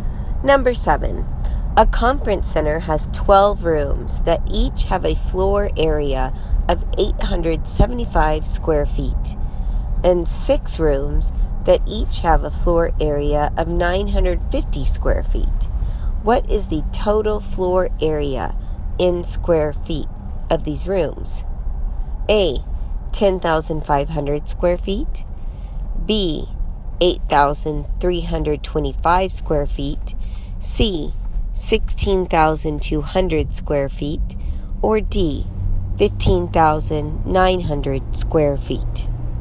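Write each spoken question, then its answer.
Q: What is the total floor area in square feet of these rooms?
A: C: 16,200 square feet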